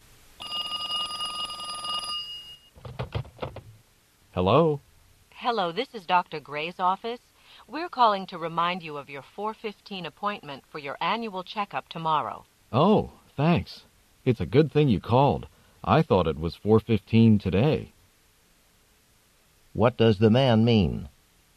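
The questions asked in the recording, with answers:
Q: What does the man mean?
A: He had the wrong day; he thought the appointment was today.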